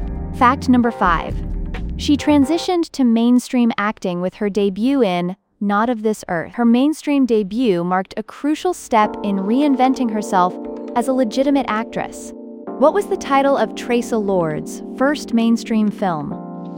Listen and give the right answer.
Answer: Correct answer, Not of This Earth.